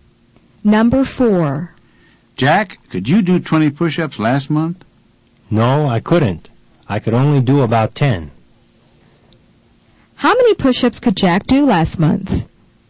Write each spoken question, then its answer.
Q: How many push-ups could Jack do last month?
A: The answer is, he could do about 10 push-ups last month.